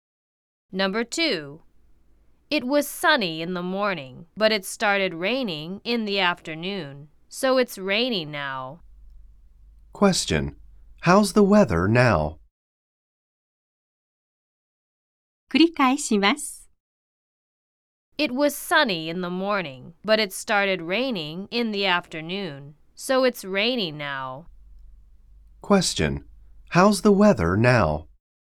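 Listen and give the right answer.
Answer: It's raining.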